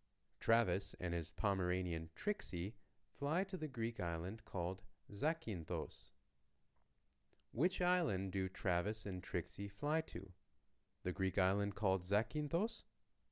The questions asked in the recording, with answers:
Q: Which island do Travis and Trixie fly to?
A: Yes, Travis and Trixie fly to Zakynthos, an island in Greece.